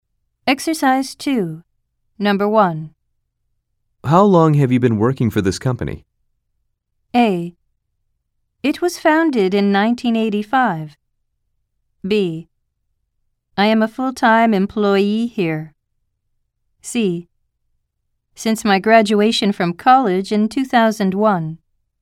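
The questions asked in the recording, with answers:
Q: How long have you been working for this company?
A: C: Since my graduation from college in 2001.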